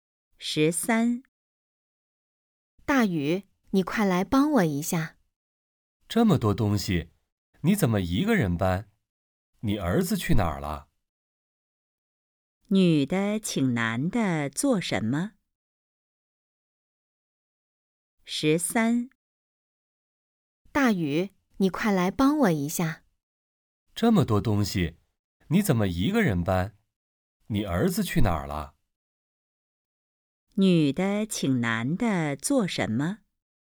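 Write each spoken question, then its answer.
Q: 女的请男的做什么?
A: 帮她搬东西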